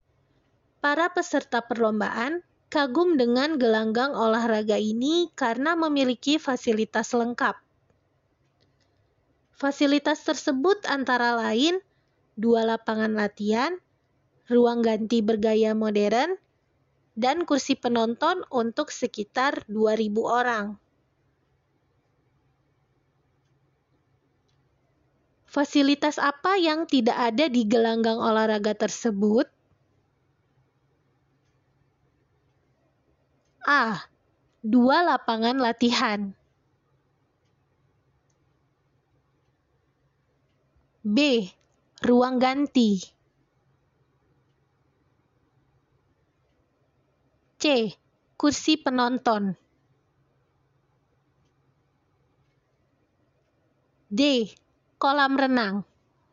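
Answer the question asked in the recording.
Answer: D: Kolam renang.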